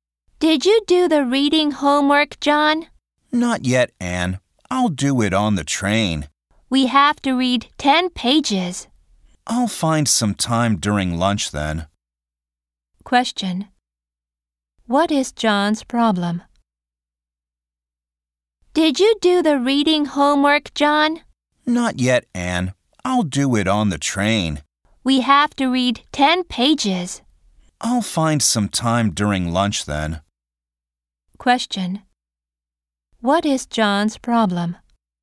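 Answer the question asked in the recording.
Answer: He hasn't done the reading homework yet.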